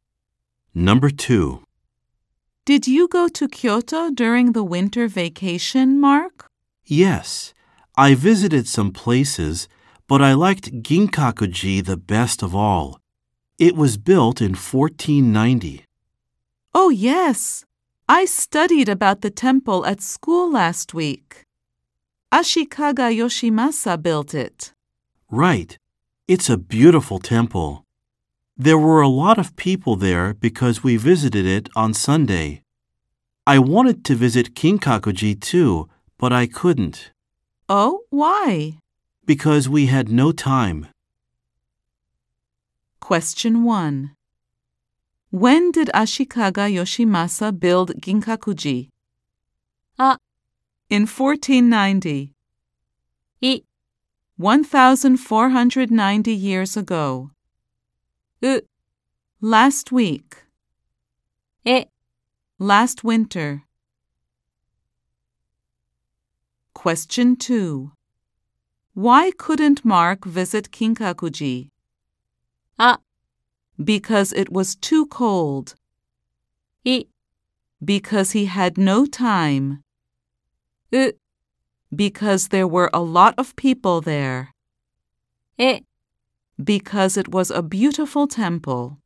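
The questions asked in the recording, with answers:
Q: When did Ashikaga Yoshimasa build Kinkaku-ji?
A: あ: In 1490.

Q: Why couldn't Mark visit Kinkaku-ji?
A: い: Because he had no time.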